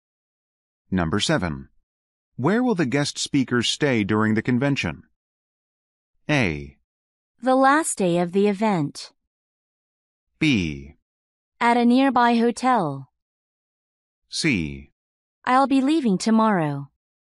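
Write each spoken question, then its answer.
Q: Where will the guest speakers stay during the convention?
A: B: At a nearby hotel.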